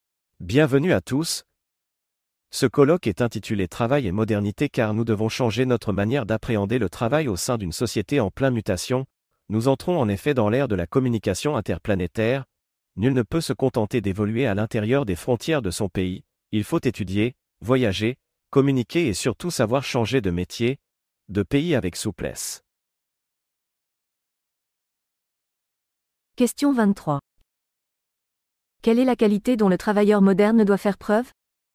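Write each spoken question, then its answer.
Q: Quelle est la qualité dont le travailleur moderne doit faire preuve?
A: La souplesse (savoir changer de métier, de pays)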